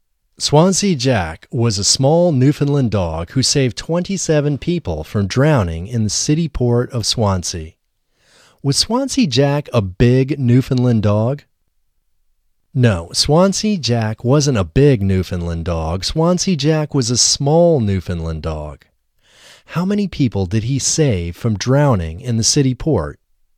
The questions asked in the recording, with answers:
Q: How many people did he save from drowning in the city port?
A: He saved 27 people from drowning in the city port.